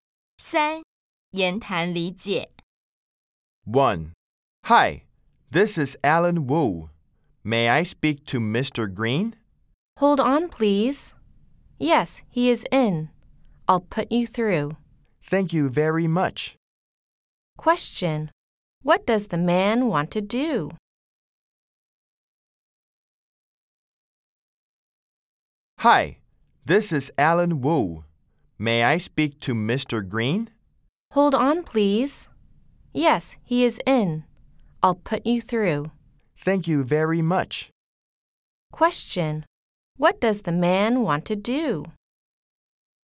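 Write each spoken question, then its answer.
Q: What does the man want to do?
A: Speak to Mr. Green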